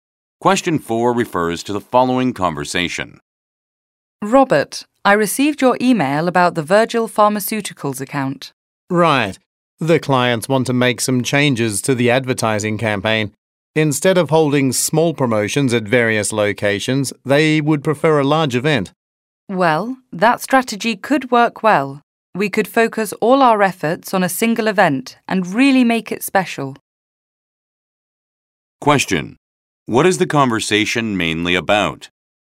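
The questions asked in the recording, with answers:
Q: What is the conversation mainly about?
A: Changes to a client's advertising campaign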